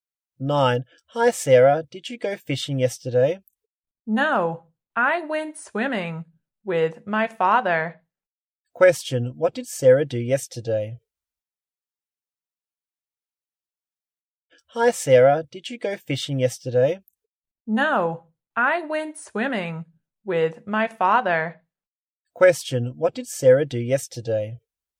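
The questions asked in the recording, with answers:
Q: what did Sarah do yesterday?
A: She went swimming with her father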